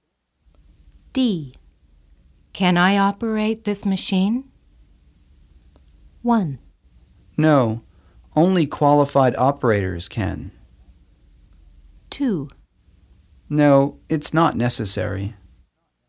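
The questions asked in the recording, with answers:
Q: Can I operate this machine?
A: 1: No, only qualified operators can.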